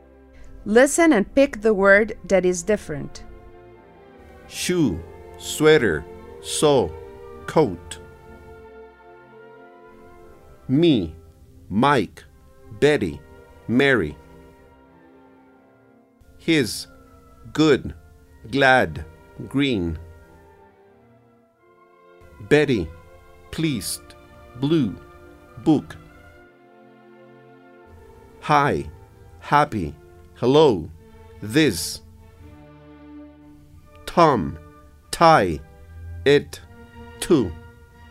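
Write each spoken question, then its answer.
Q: Me, Mike, Betty, Mary.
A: Me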